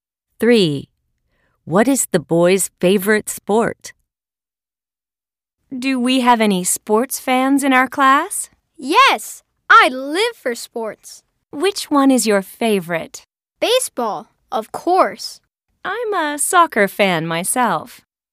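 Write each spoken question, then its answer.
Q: What is the boy's favorite sport?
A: baseball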